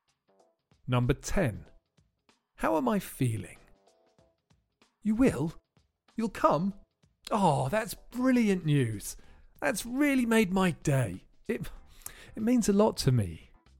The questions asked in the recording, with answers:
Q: How am I feeling?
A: I'm feeling really happy.